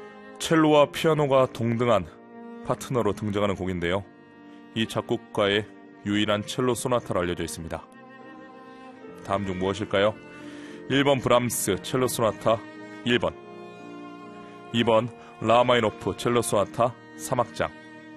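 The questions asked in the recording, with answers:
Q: 다음 중 무엇일까요? 1번 브람스 첼로 소나타 1번, 2번 라마이노프 첼로 소나타 3악장.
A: 2번: 라흐마니노프 첼로 소나타 3악장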